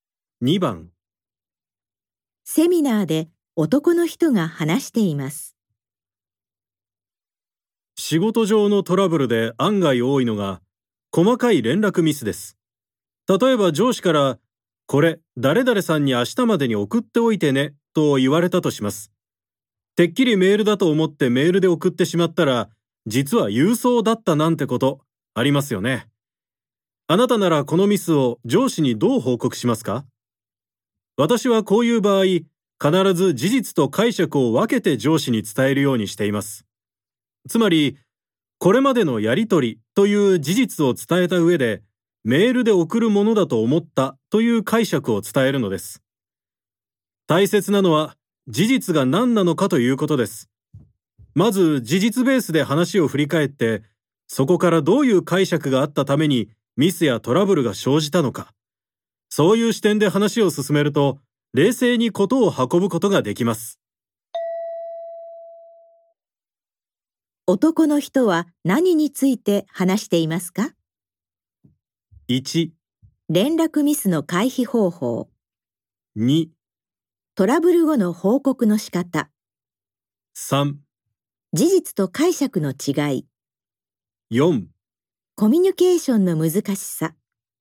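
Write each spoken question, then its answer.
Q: 男の人は何について話していますか ?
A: 2: トラブル後の報告の仕方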